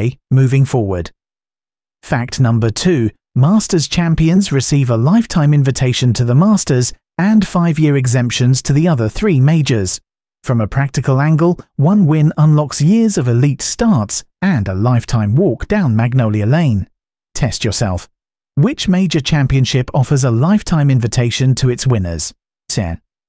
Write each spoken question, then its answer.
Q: Which major championship offers a lifetime invitation to its winners?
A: Correct answer. The Masters.